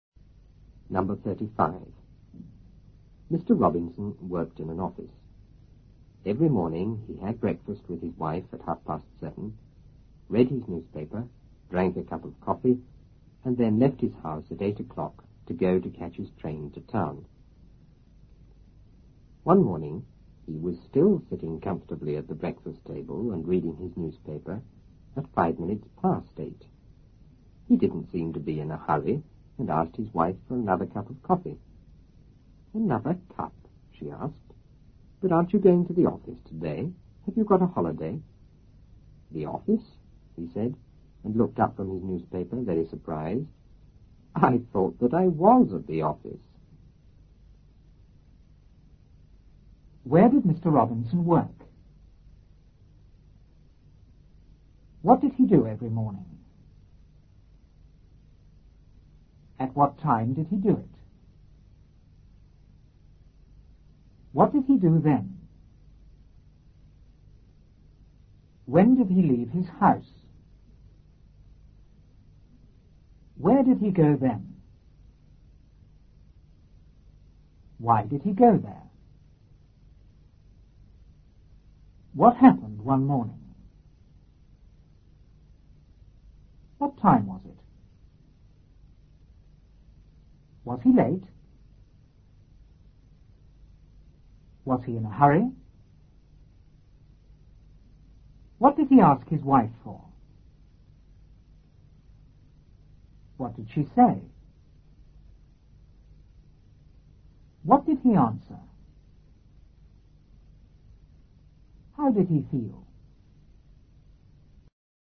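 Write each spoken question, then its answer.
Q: Where did Mr. Robinson work?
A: In an office

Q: What did he do every morning?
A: He had breakfast with his wife

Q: At what time did he do it?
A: At 7:30

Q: What did he do then?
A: Read his newspaper and drank a cup of coffee

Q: When did he leave his house?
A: At 8 o'clock

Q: Where did he go then?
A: To catch his train to town

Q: What happened one morning?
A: He was still sitting at the breakfast table reading his newspaper

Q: What time was it?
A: 8:05

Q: Was he in a hurry?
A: No

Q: What did he ask his wife for?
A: Another cup of coffee

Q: What did she say?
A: Another cup? Aren't you going to the office today? Have you got a holiday?

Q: What did he answer?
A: I thought that I was at the office.

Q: How did he feel?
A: Very surprised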